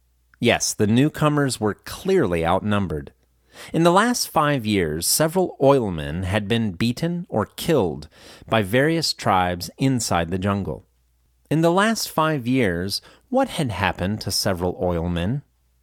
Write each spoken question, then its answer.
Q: In the last 5 years, what had happened to several oilmen?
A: In the last 5 years, several oilmen had been beaten or killed by various tribes inside the jungle.